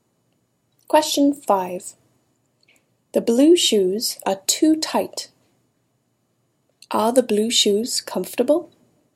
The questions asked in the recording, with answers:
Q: Are the blue shoes comfortable?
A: No. The blue shoes are not comfortable.